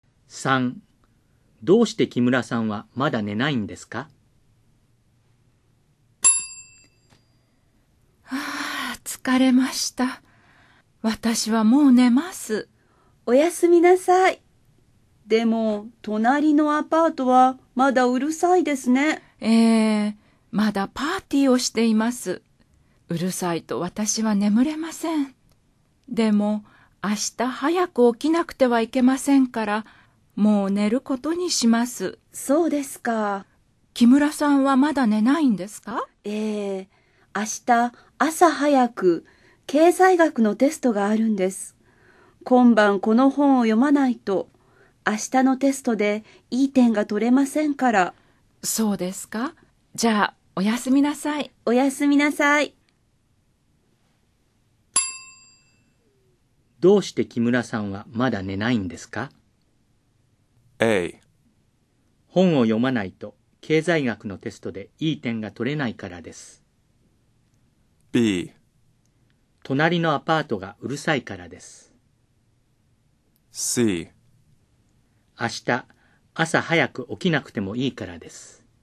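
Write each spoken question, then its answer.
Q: どうして木村さんはまだ寝ないんですか?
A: A: 本を読まないと経済学のテストでいい点が取れないからです。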